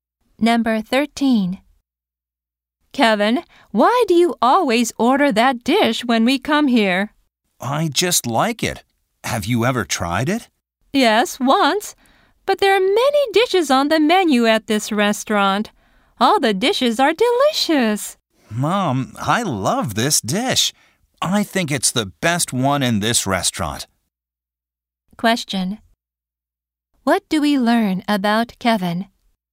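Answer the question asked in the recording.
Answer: He always orders the same dish, which he loves.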